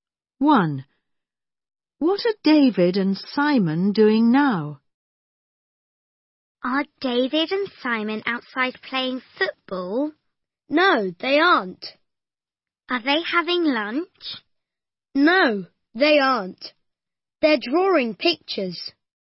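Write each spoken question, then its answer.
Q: What are David and Simon doing now?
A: They're drawing pictures.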